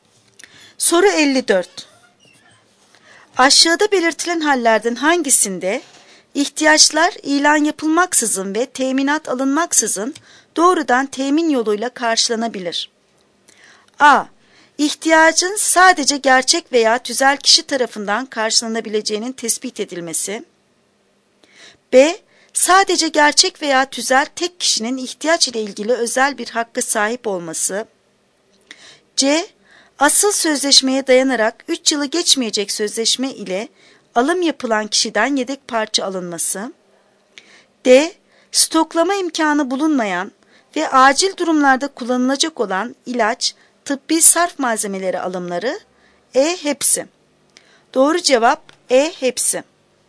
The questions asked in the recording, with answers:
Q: Aşağıda belirtilen hallerden hangisinde ihtiyaçlar ilan yapılmaksızın ve teminat alınmaksızın doğrudan temin yoluyla karşılanabilir?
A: Doğru cevap E. Hepsi.